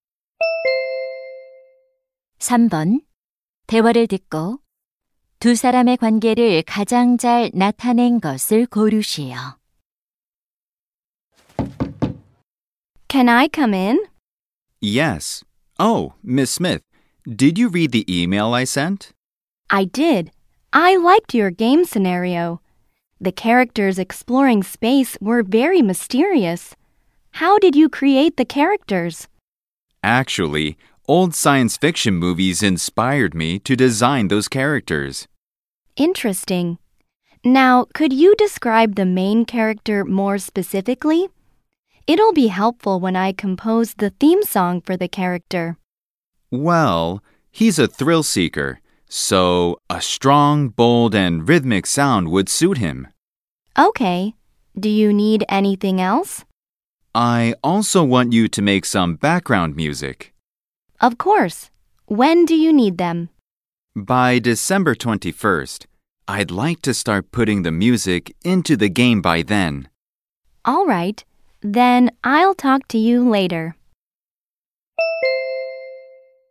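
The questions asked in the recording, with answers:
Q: 대화를 듣고 두 사람의 관계를 가장 잘 나타낸 것을 고르시오.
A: 게임 개발자 - 작곡가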